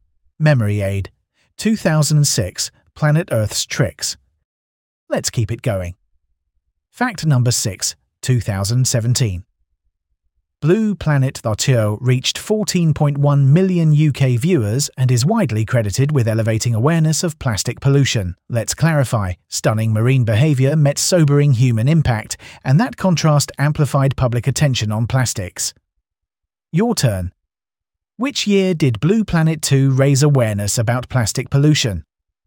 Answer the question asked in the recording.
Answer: Correct answer, 2017.